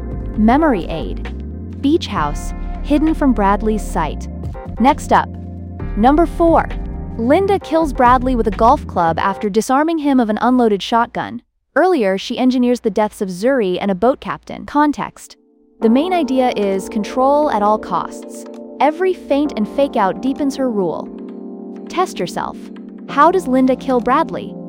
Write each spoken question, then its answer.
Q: How does Linda kill Bradley?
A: With a golf club.